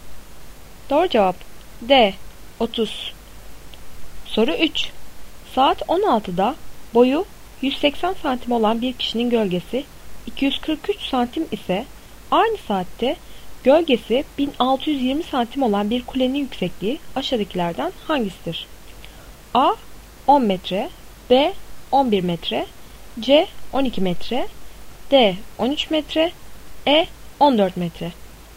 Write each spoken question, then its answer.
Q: Saat 16'da boyu 180 santim olan bir kişinin gölgesi 243 santim ise aynı saatte gölgesi 1620 santim olan bir kulenin yüksekliği aşağıdakilerden hangisidir?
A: Doğru cevap C 12 metre.